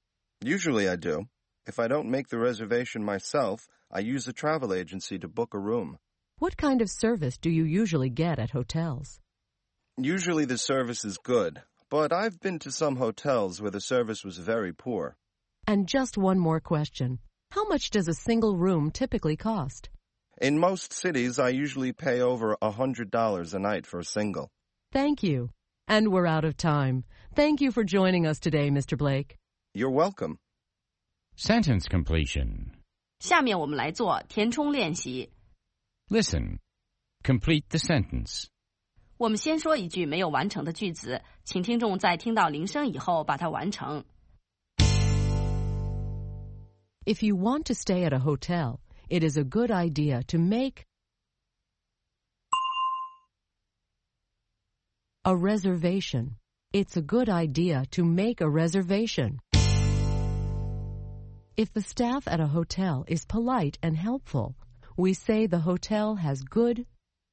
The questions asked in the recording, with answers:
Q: If you want to stay at a hotel, it is a good idea to make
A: a reservation. It's a good idea to make a reservation.